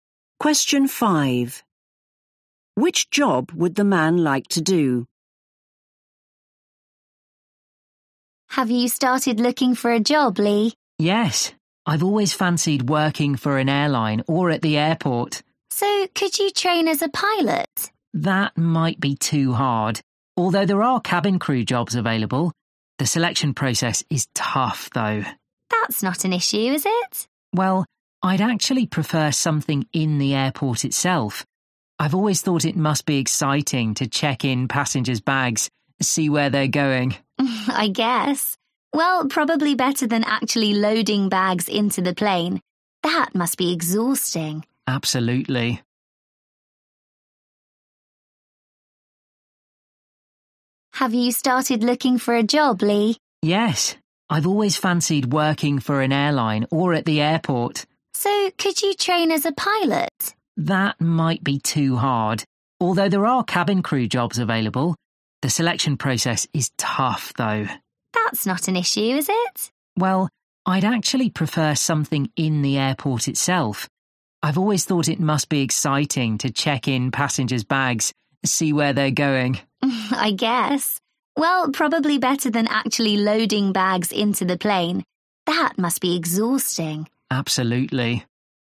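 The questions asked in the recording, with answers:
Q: Which job would the man like to do?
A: checking in passengers' bags at the airport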